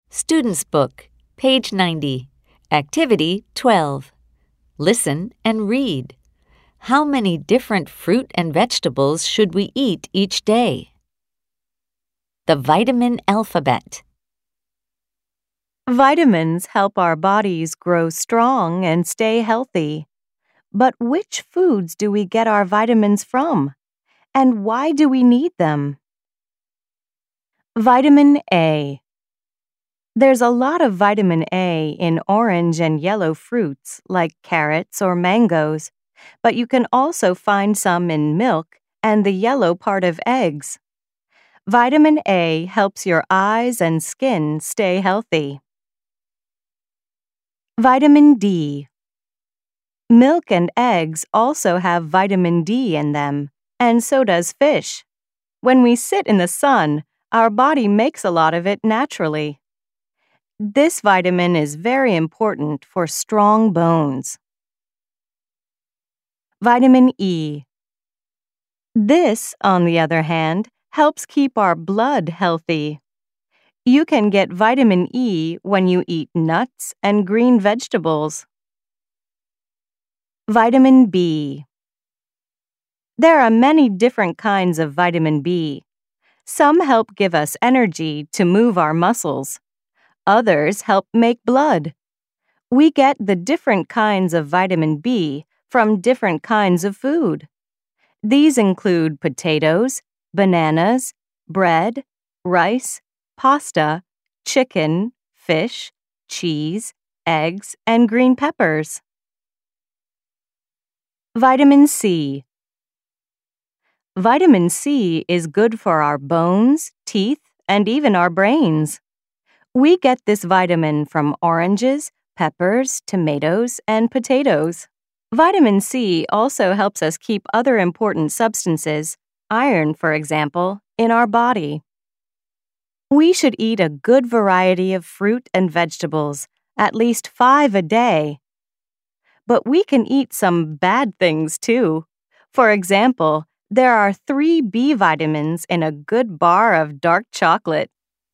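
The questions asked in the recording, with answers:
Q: How many different fruit and vegetables should we eat each day?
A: At least 5 a day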